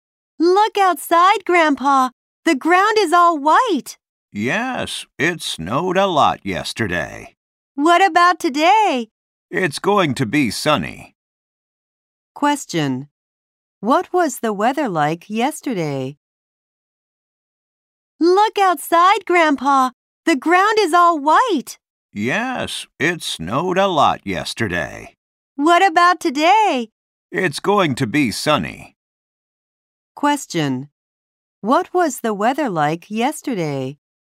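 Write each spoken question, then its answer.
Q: What was the weather like yesterday?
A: It was snowy.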